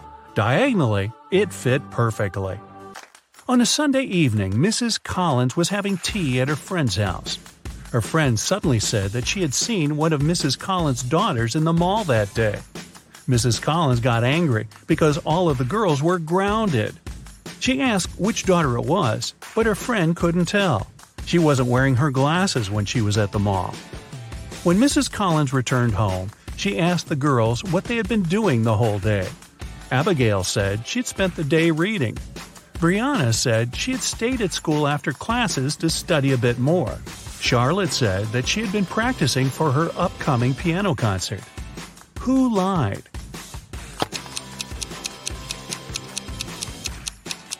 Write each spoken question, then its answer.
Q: Who lied?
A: Brianna. It's Sunday. There's no school.